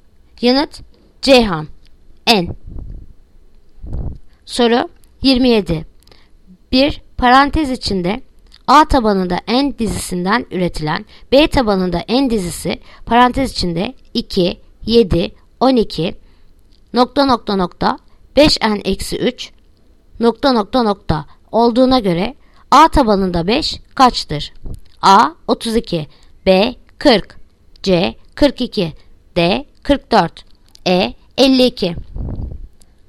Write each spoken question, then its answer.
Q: Bir parantez içinde A tabanında n dizisinden üretilen B tabanında n dizisi parantez içinde 2, 7, 12 nokta nokta nokta 5n eksi 3 nokta nokta nokta olduğuna göre A tabanında 5 kaçtır?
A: Yanıt Ceyhan 42.